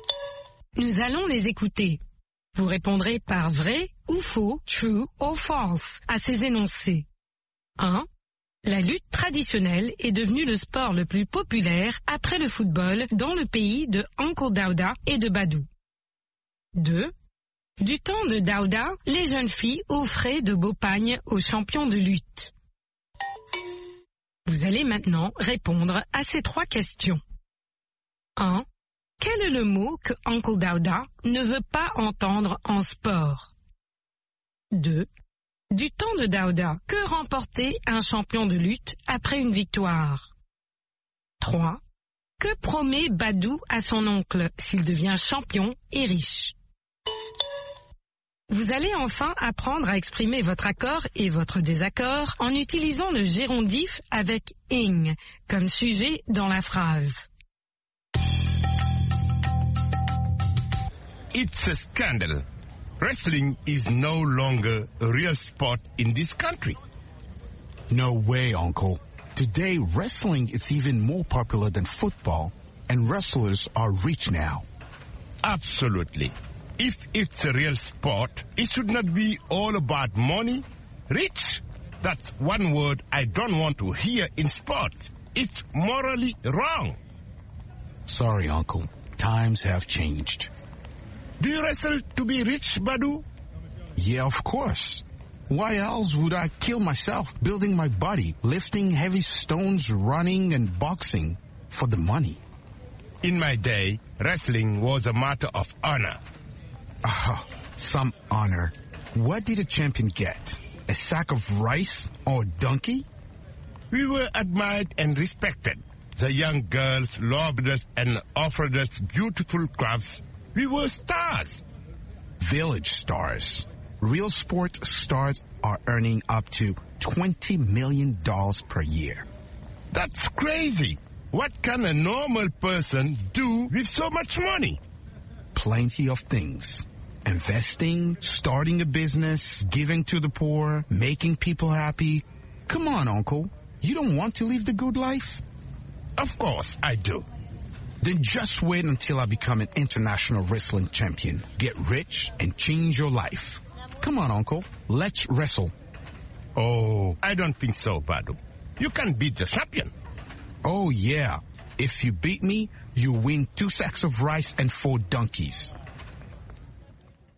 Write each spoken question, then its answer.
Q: La lutte traditionnelle est devenue le sport le plus populaire après le football dans le pays de Uncle Daouda et de Badou.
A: L'énoncé 1 est faux.

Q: Du temps de Daouda, les jeunes filles offraient de beaux pagnes aux champions de lutte.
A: L'énoncé 2 est vrai.

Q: Quel est le mot que Uncle Daouda ne veut pas entendre en sport?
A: Riche.

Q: Que promet Badou à son oncle s'il devient champion et riche?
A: De changer la vie de son oncle.